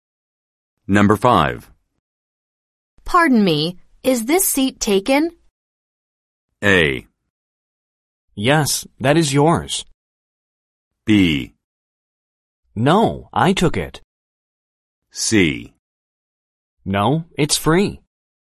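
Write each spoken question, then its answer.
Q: Pardon me, is this seat taken?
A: C: No, it's free.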